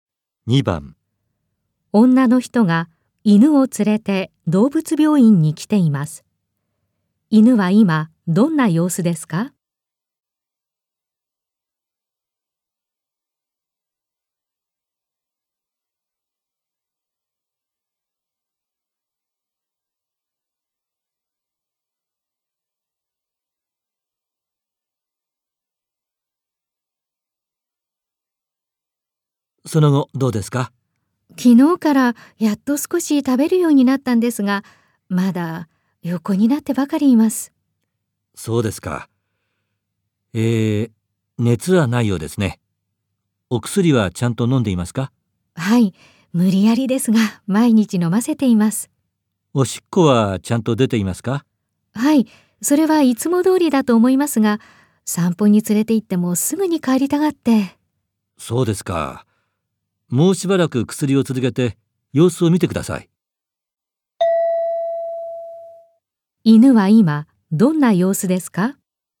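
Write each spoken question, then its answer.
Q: 犬は今どんな様子ですか?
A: 少し食べるようになったが、まだ横になってばかりいる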